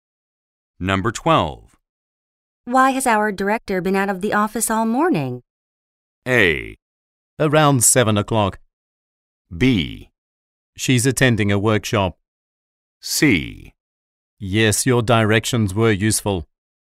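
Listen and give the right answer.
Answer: B: She's attending a workshop.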